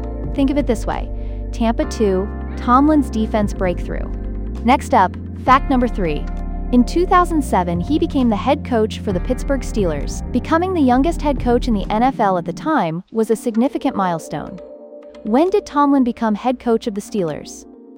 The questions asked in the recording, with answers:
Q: When did Tomlin become head coach of the Steelers?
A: Correct answer, 2007.